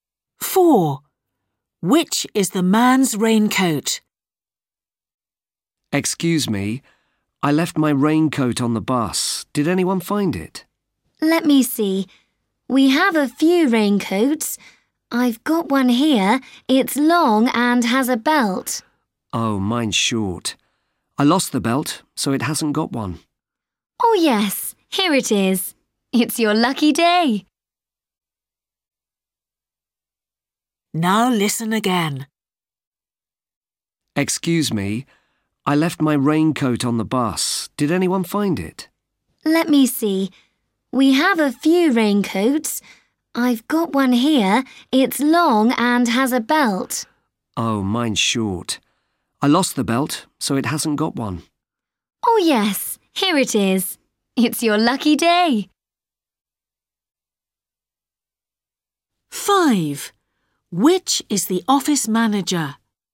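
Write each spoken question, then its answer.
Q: Which is the man's raincoat?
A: A short raincoat without a belt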